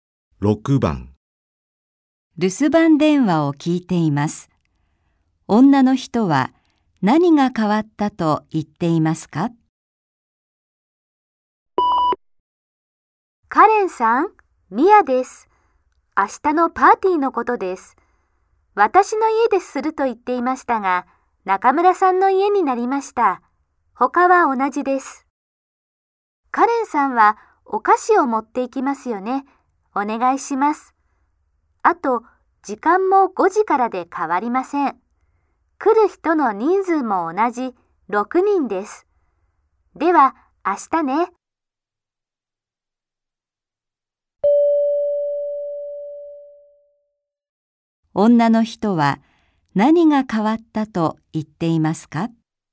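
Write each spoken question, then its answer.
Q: 女の人は何が変わったと言っていますか?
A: パーティーの場所(中村さんの家になった)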